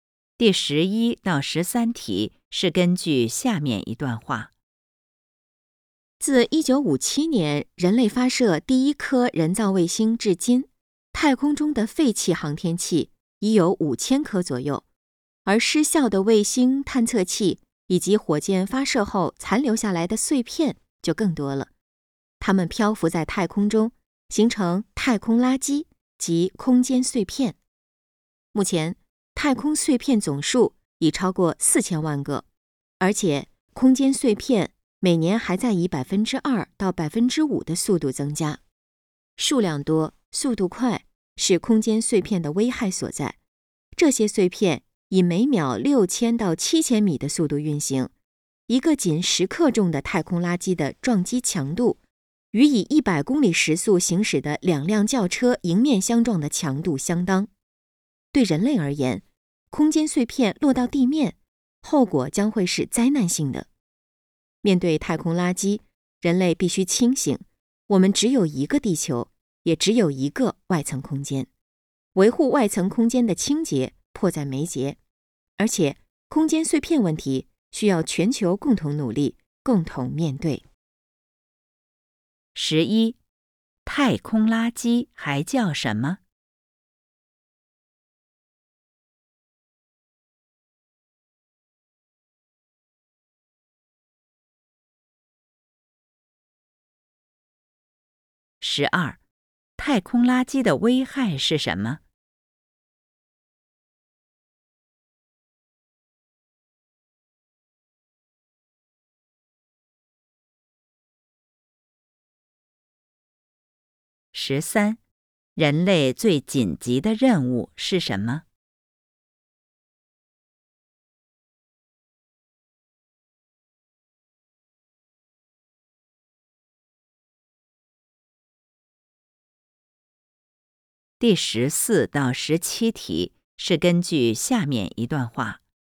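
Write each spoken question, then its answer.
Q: 太空垃圾还叫什么?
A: 空间碎片

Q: 太空垃圾的危害是什么?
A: 数量多,速度快

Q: 人类最紧急的任务是什么?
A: 维护外层空间的清洁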